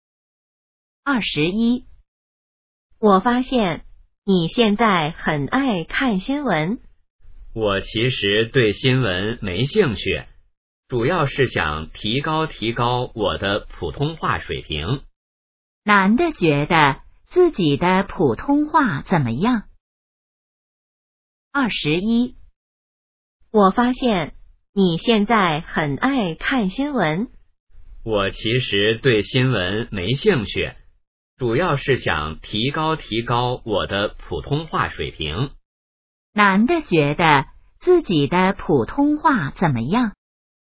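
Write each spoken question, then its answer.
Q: 男的觉得自己的普通话怎么样?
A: 不够好,需要提高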